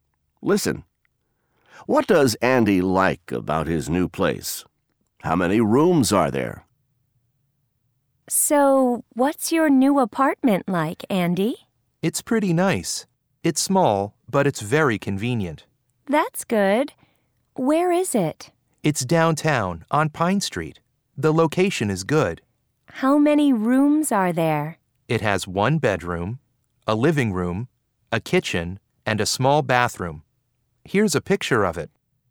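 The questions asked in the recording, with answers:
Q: What does Andy like about his new place?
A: It's very convenient; the location is good (downtown, on Pine Street).

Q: How many rooms are there?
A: Four: one bedroom, a living room, a kitchen, and a small bathroom.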